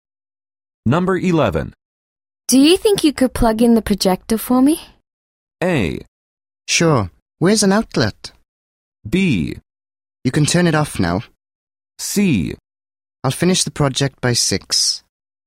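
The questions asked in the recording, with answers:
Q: Do you think you could plug in the projector for me?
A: A: Sure. Where's an outlet?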